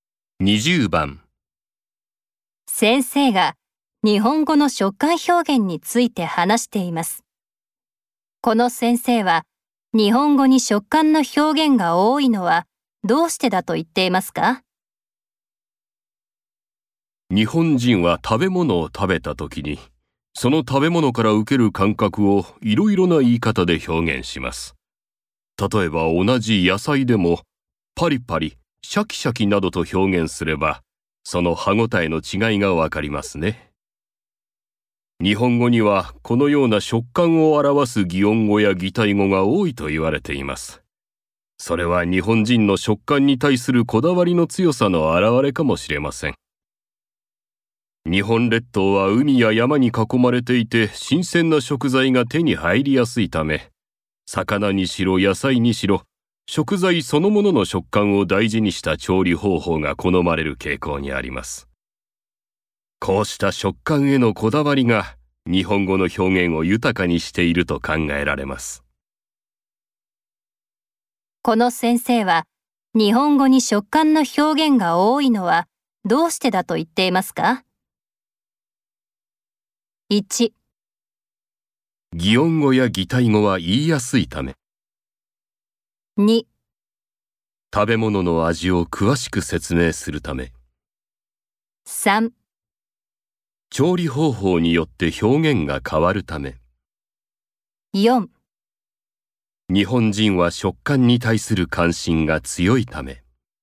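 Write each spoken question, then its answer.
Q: この先生は、日本語に食感の表現が多いのはどうしてだと言っていますか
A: 4: 日本人は食感に対する関心が強いため。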